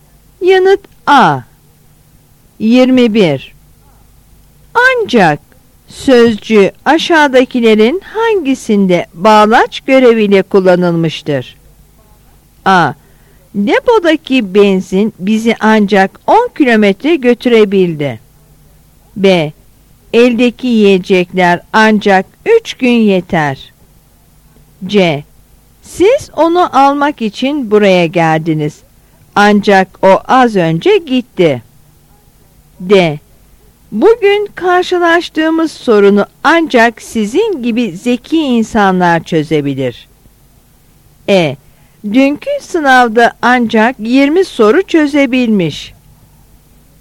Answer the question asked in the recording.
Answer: Yanıt C.